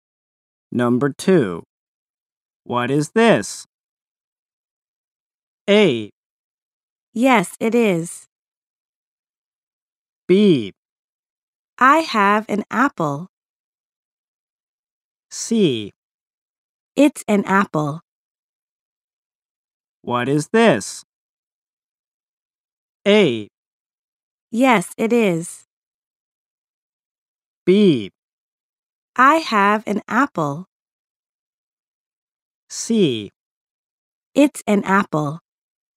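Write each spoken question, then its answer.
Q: What is this?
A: C: It's an apple.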